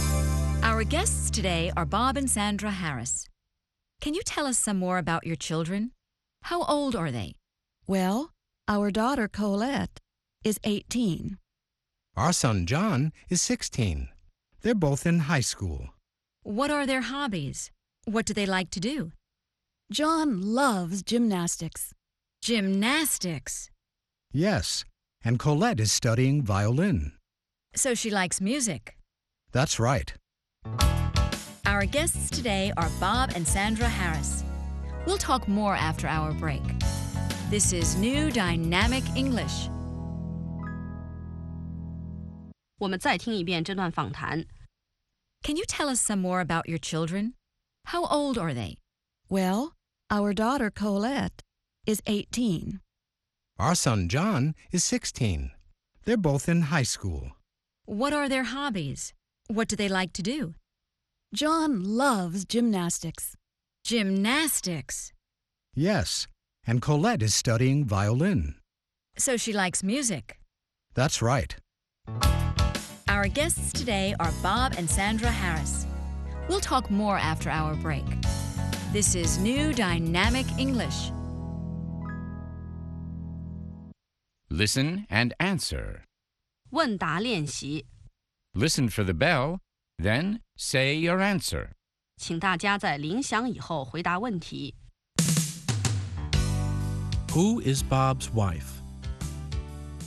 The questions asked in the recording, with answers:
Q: Who is Bob's wife?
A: Sandra is Bob's wife.